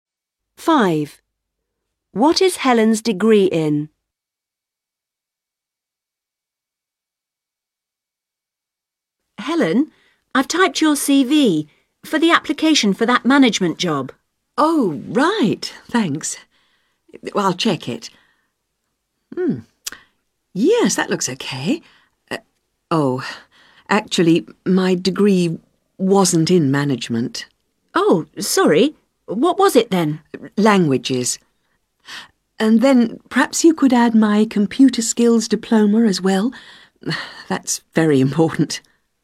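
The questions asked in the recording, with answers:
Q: What is Helen's degree in?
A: Languages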